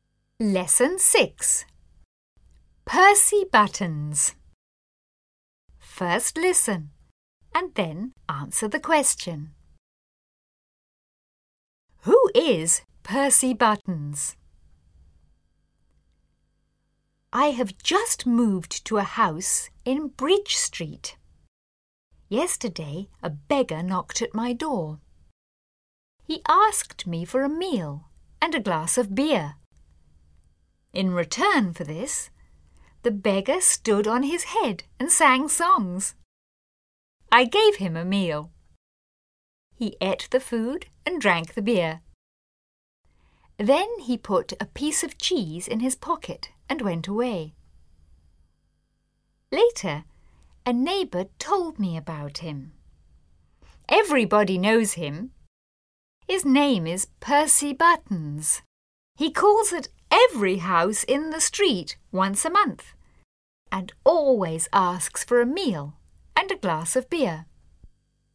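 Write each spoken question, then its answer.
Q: Who is Percy Buttons?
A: A beggar who calls at every house in the street once a month asking for a meal and a glass of beer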